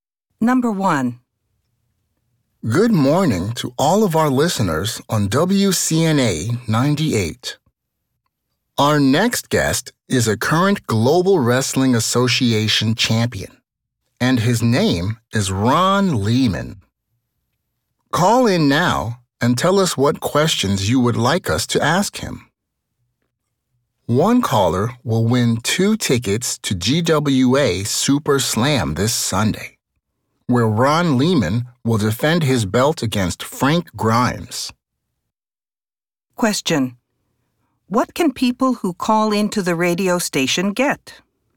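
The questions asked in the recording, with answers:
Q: What can people who call into the radio station get?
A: A chance to win two tickets to GWA Super Slam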